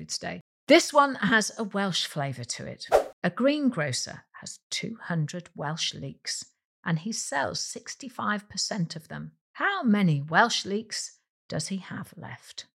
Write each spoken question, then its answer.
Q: How many Welsh leeks does he have left?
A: The answer is 70 leeks are left.